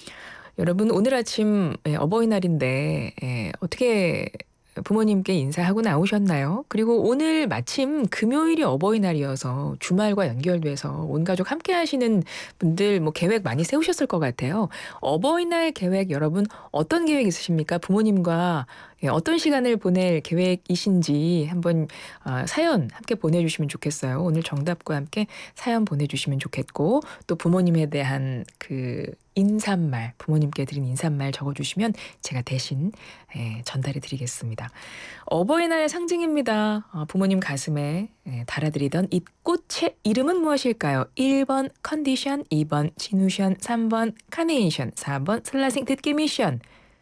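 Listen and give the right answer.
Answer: 3: 카네이션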